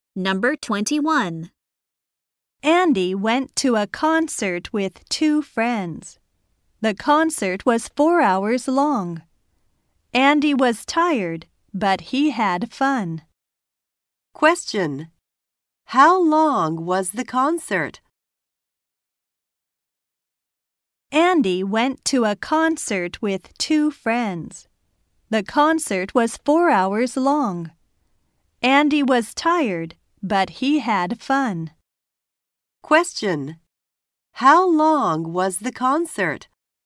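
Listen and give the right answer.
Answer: 4 hours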